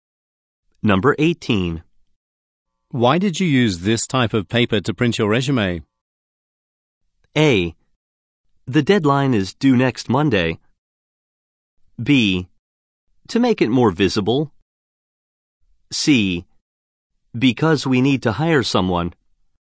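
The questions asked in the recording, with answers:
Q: Why did you use this type of paper to print your resume?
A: B: To make it more visible.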